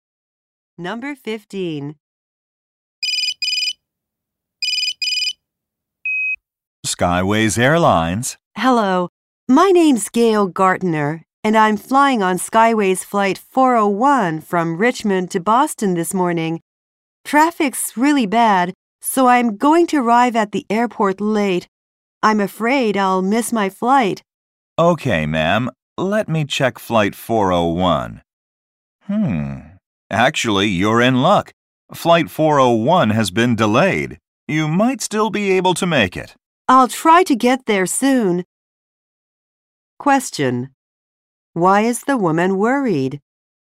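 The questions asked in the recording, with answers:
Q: Why is the woman worried?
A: She may miss her flight due to traffic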